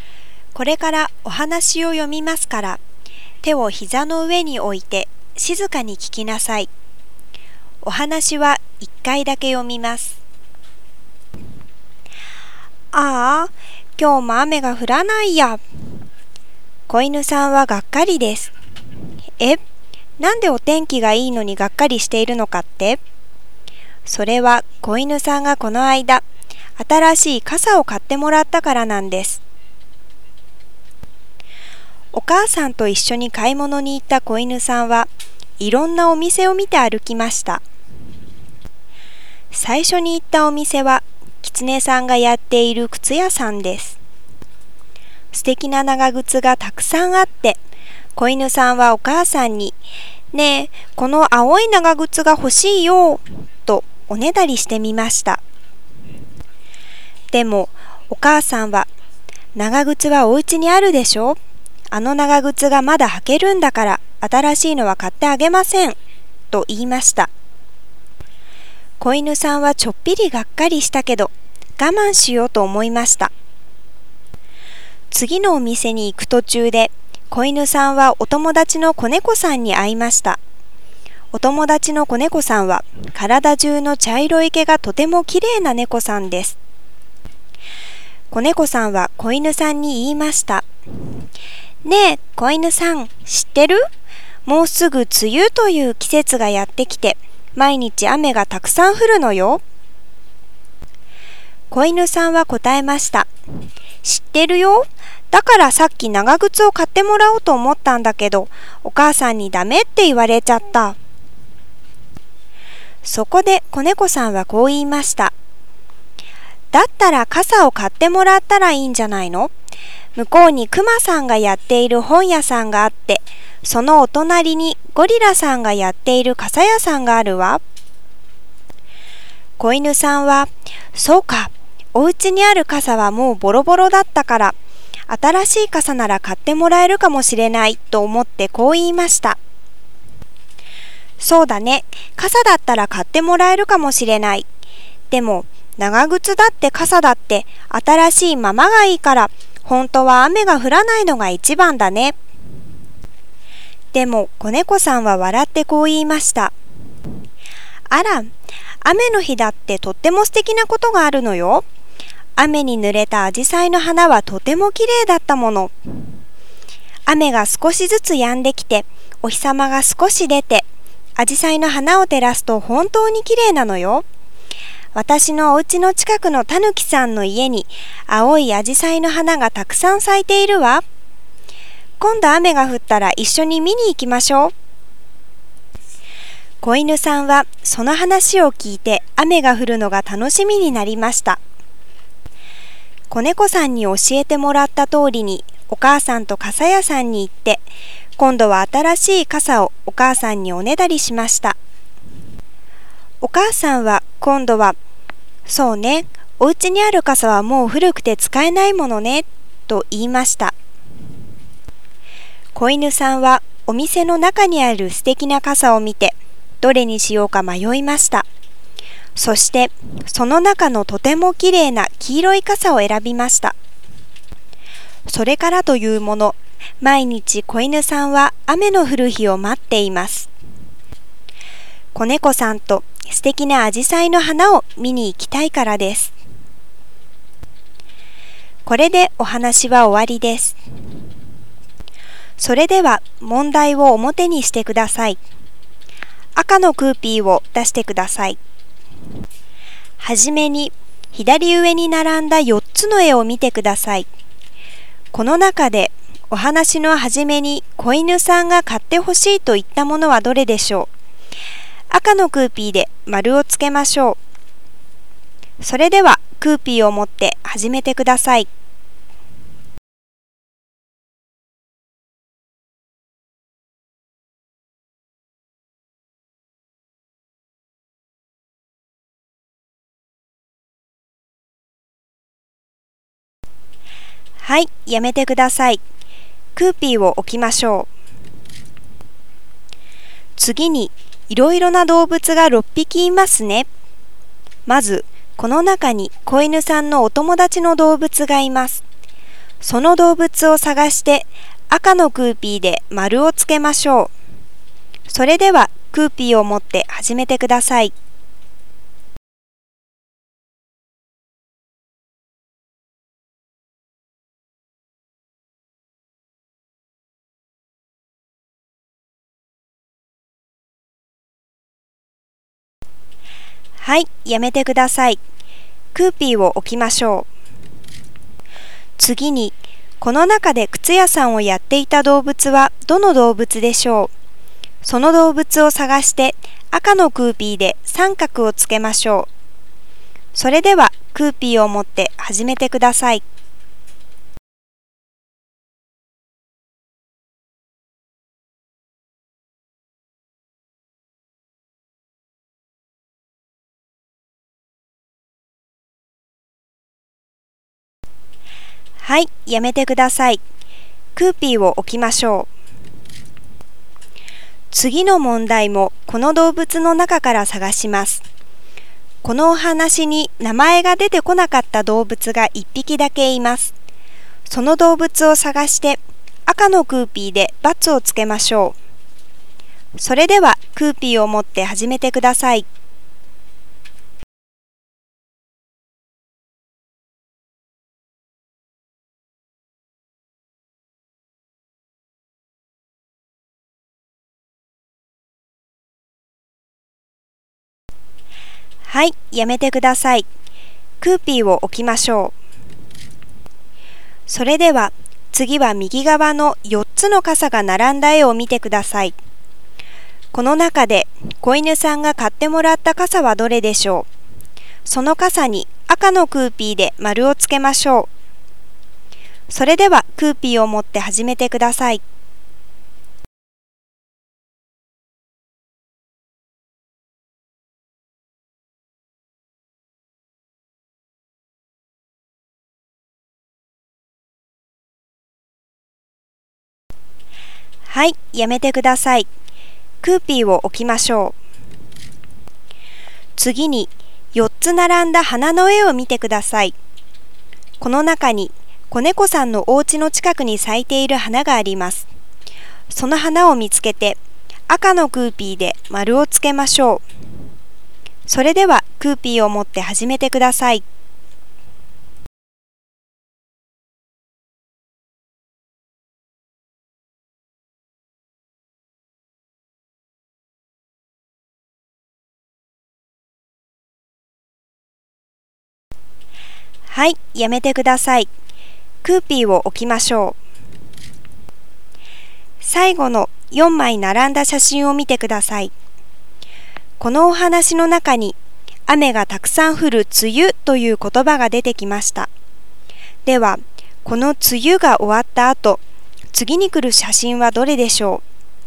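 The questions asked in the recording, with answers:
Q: この中でお話のはじめに子犬さんが買ってほしいと言ったものはどれでしょう。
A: 青い長靴

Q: まずこの中に子犬さんのお友達の動物がいます。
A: 子猫

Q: この中で、子犬さんが買ってもらった傘はどれでしょう。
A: 黄色い傘

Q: この中に、子猫さんのお家の近くに咲いている花があります。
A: 青い紫陽花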